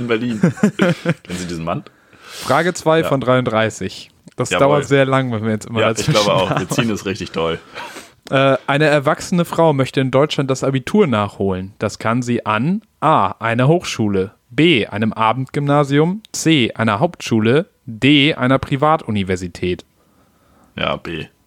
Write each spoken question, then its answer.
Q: Äh, eine erwachsene Frau möchte in Deutschland das Abitur nachholen. Das kann sie an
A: Ja, B.